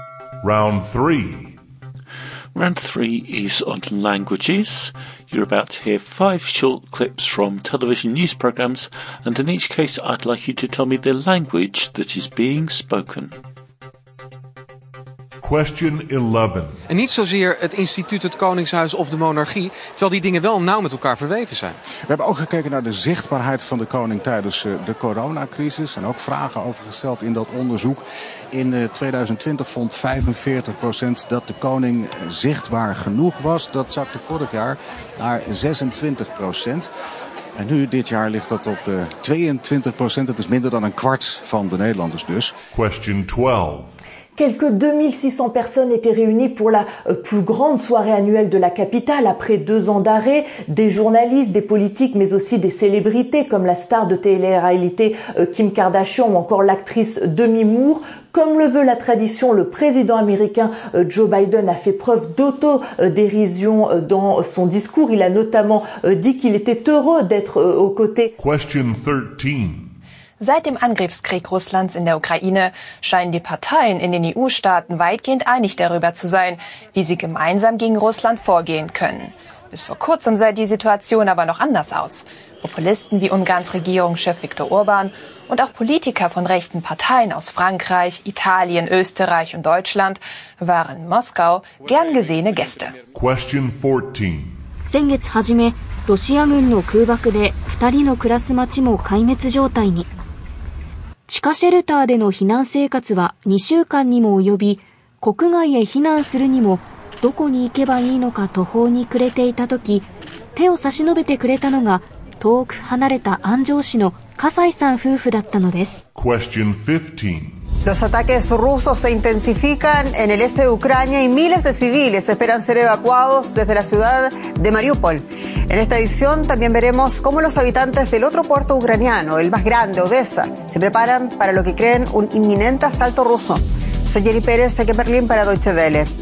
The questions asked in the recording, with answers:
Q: I'd like you to tell me the language that is being spoken.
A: was Dutch.

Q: I'd like you to tell me the language that is being spoken.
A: Number 12 was French.

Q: I'd like you to tell me the language that is being spoken.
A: Number 13 was German.

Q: I'd like you to tell me the language that is being spoken.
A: Number 14 was Japanese.

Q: I'd like you to tell me the language that is being spoken.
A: And number 15 was Spanish.